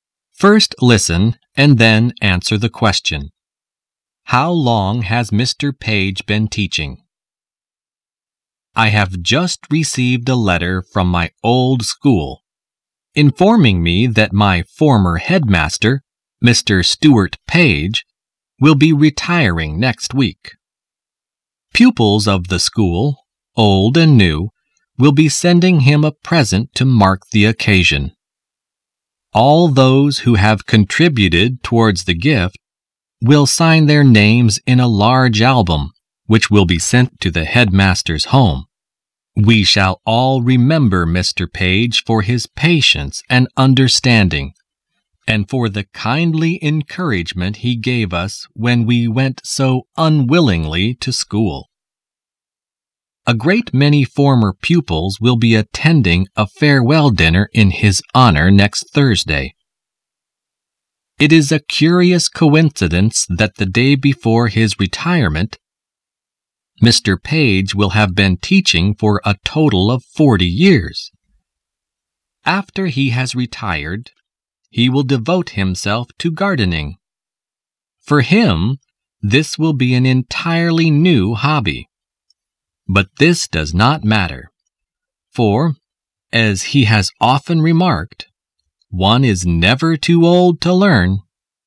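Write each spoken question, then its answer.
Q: How long has Mr. Page been teaching?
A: For (almost) 40 years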